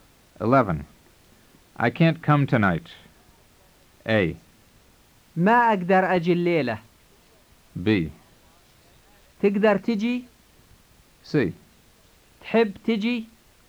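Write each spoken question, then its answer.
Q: I can't come tonight.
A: A: ما أقدر أجي الليلة.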